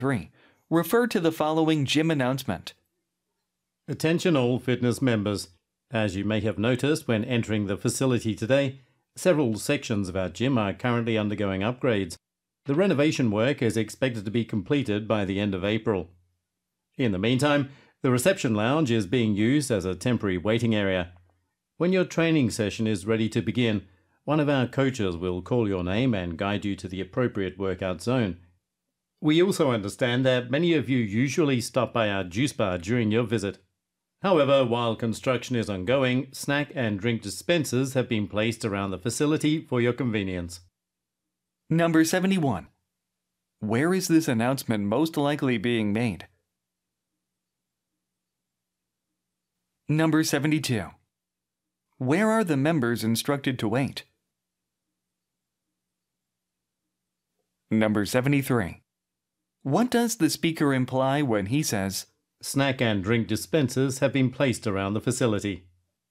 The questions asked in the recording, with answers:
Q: Where is this announcement most likely being made?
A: gym이 답이죠.

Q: Where are the members instructed to wait?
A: In the reception lounge.